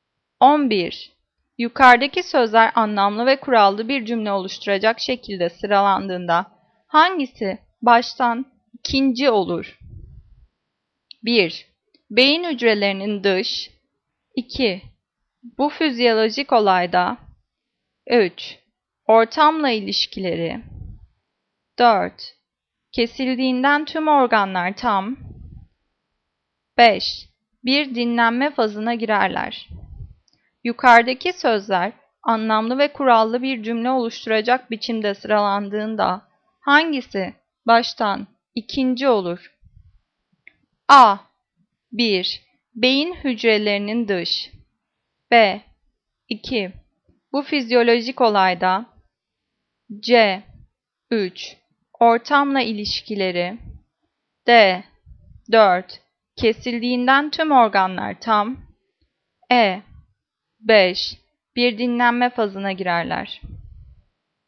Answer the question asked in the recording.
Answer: Cevap A. 1. Beyin hücrelerinin dış.